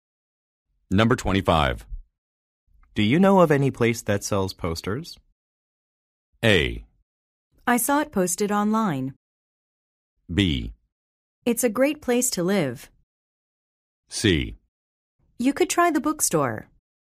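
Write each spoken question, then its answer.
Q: Do you know of any place that sells posters?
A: C: You could try the bookstore.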